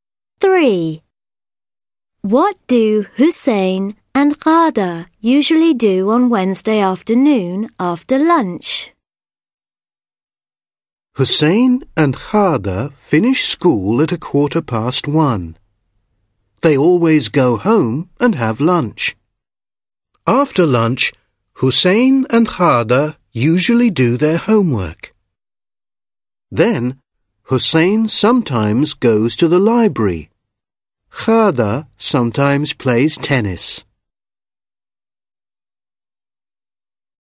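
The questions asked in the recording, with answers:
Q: What do Hussein and Ghada usually do on Wednesday afternoon after lunch?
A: They do their homework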